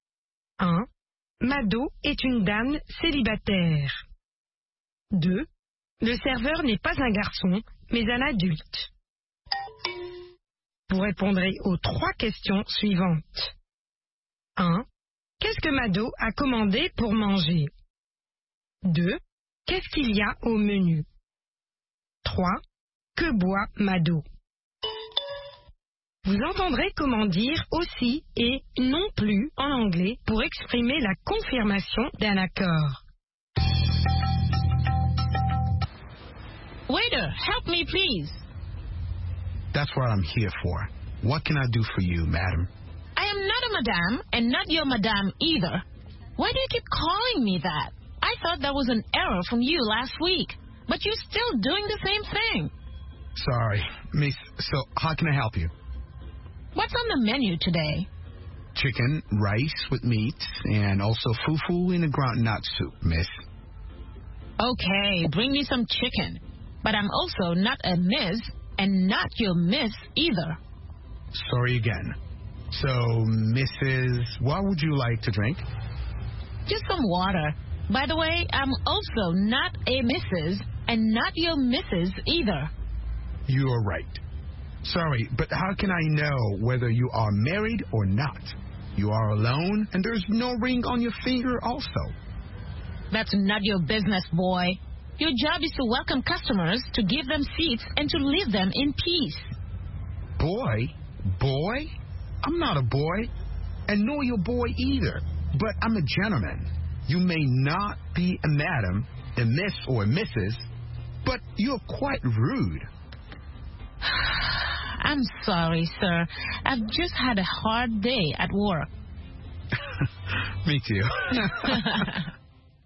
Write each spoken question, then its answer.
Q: Le serveur n'est pas un garçon, mais un adulte.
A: L'énoncé 2 est vrai. Le serveur n'est pas un garçon, mais un adulte.

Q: Qu'est-ce que Mado a commandé pour manger?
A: Elle a commandé du poulet.

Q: Qu'est-ce qu'il y a au menu?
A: Du poulet, du riz, de la viande et du foufou.

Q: Que boit Mado?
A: De l'eau.